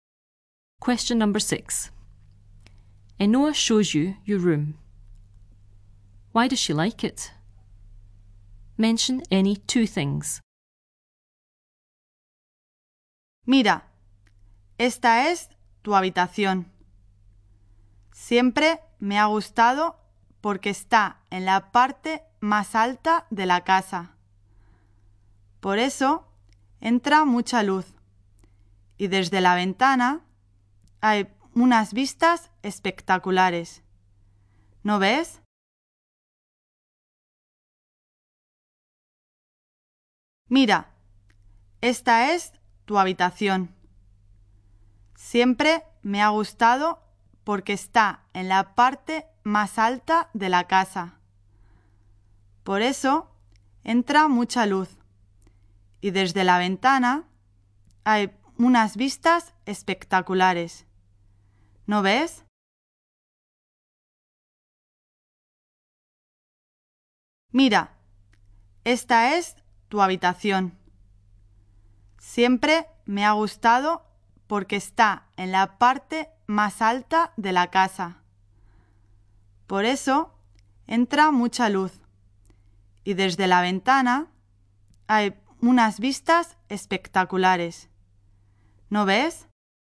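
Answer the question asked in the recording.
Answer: It is at the top of the house, gets lots of light, spectacular views from the window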